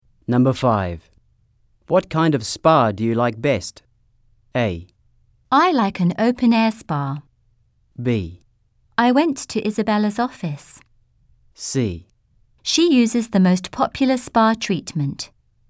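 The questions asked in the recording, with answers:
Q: What kind of spa do you like best?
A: A: I like an open-air spa.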